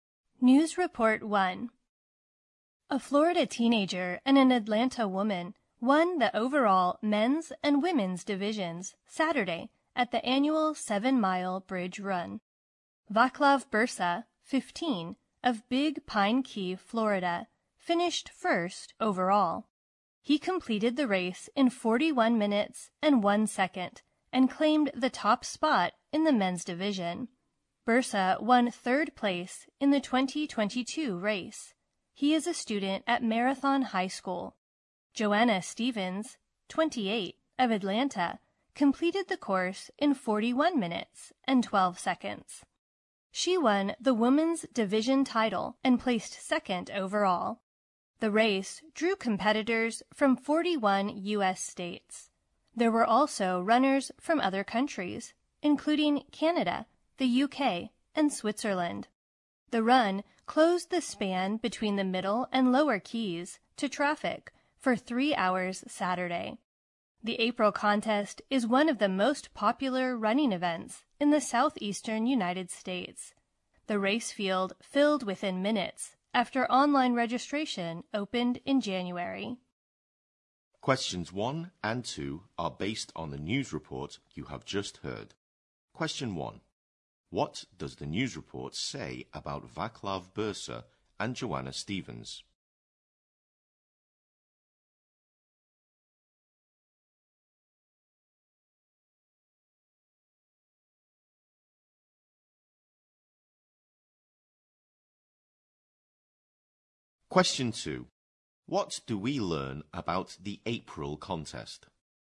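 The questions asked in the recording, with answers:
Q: What does the news report say about Vaclav Bursa and Joanna Stevens?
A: They won the men's and women's divisions of the 7-mile bridge run

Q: What do we learn about the April contest?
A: It is one of the most popular running events in the southeastern US; its field filled within minutes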